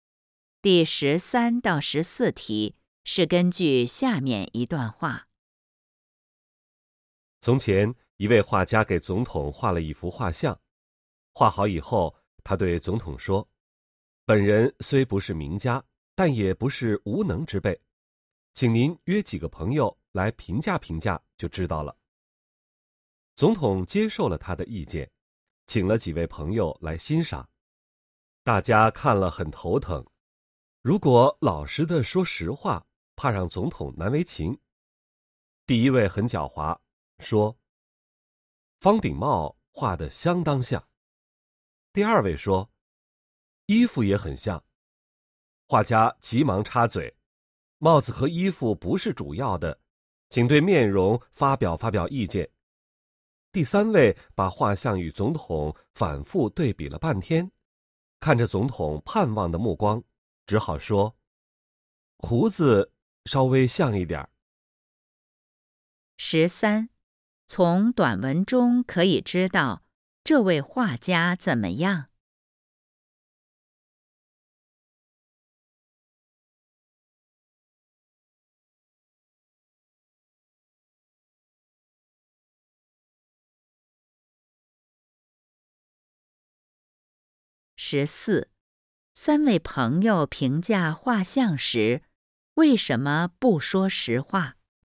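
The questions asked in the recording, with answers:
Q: 三位朋友评价画像时,为什么不说实话?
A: 怕让总统难为情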